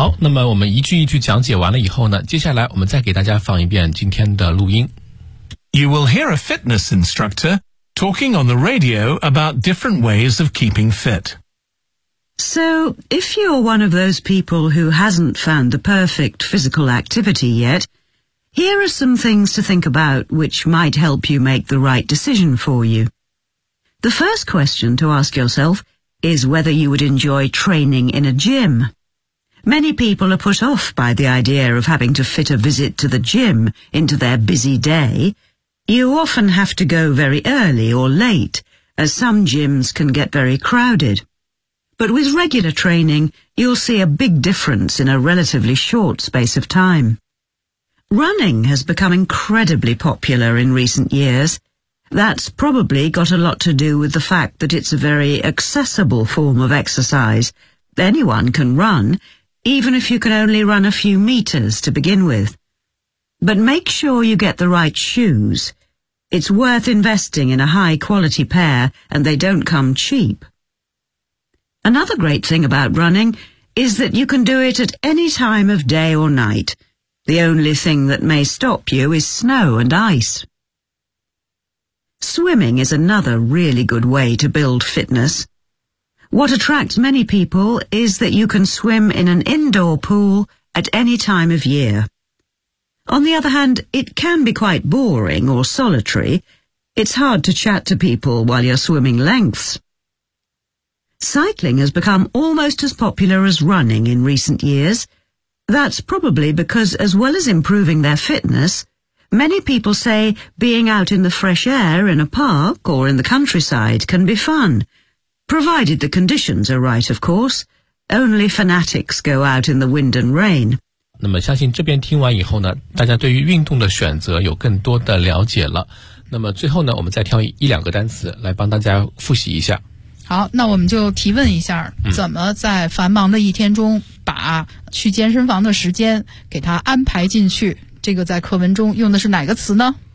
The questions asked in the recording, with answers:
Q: 好,那我们就提问一下,怎么在繁忙的一天中把去健身房的时间给它安排进去,这个在课文中用的是哪个词呢?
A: fit